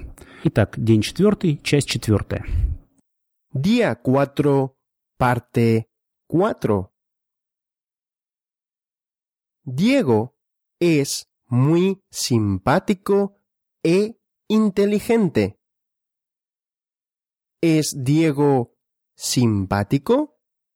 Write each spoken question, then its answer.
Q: ¿Es Diego simpático?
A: Sí, Diego es simpático.